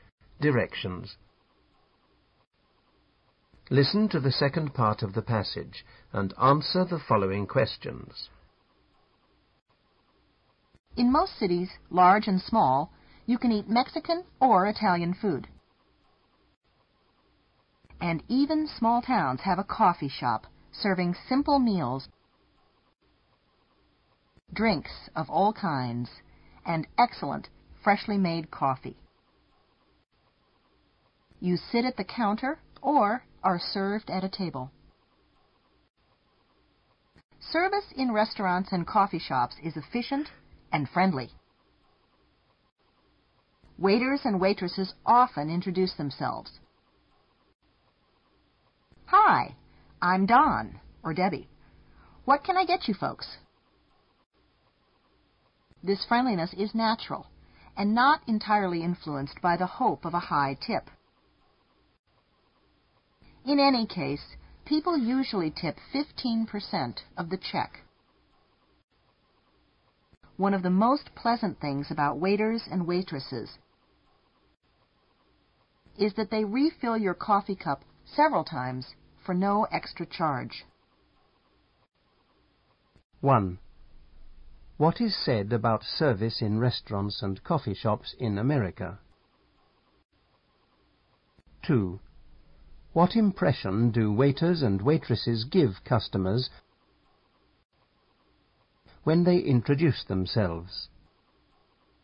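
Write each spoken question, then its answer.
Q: What is said about service in restaurants and coffee shops in America?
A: It is efficient and friendly.

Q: What impression do waiters and waitresses give customers when they introduce themselves?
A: They seem friendly; the friendliness is natural, not just for a high tip.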